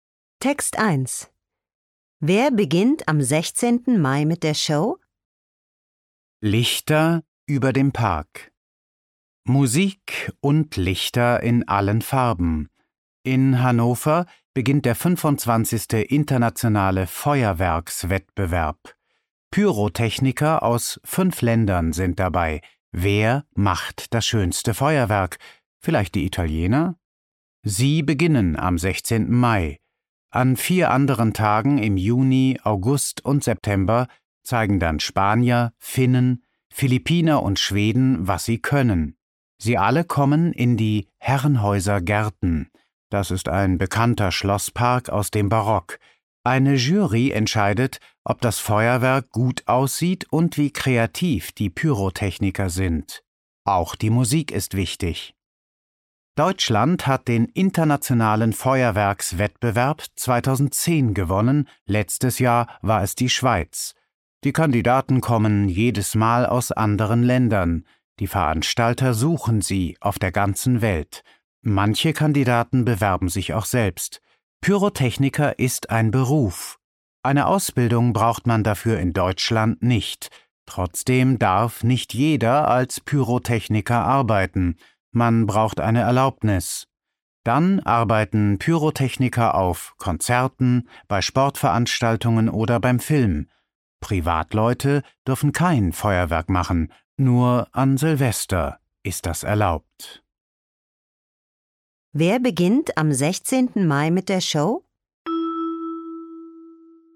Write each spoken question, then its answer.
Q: Wer beginnt am 16. Mai mit der Show?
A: Die Italiener beginnen mit dem Feuerwerk.